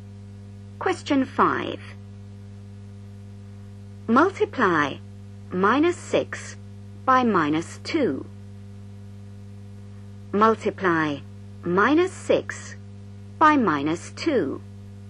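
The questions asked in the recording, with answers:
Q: Multiply minus 6 by minus 2.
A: 12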